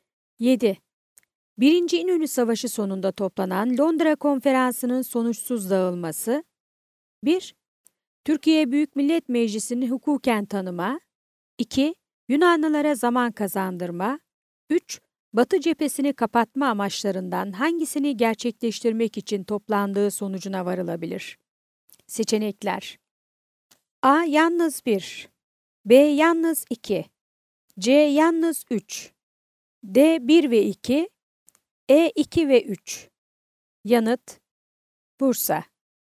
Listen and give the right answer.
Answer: Yanıt: Bursa.